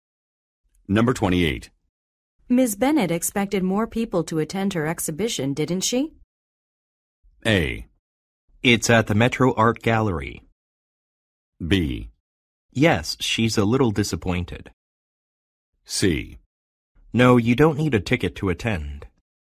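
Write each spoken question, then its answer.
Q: Ms. Bennett expected more people to attend her exhibition, didn't she?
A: B: Yes, she's a little disappointed.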